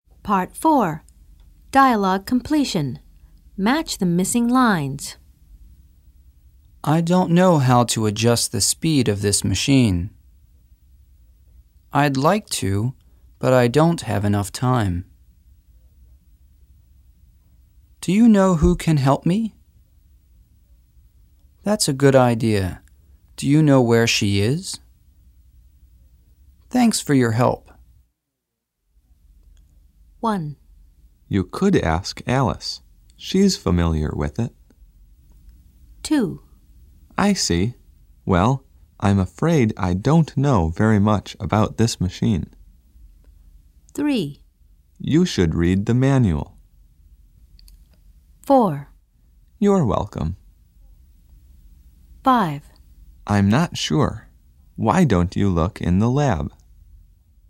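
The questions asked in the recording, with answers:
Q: You could ask Alice. She's familiar with it.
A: Do you know who can help me?

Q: I see. Well, I'm afraid I don't know very much about this machine.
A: I'd like to, but I don't have enough time.

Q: You should read the manual.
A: I don't know how to adjust the speed of this machine.

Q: You're welcome.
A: Thanks for your help.

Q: I'm not sure. Why don't you look in the lab?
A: That's a good idea. Do you know where she is?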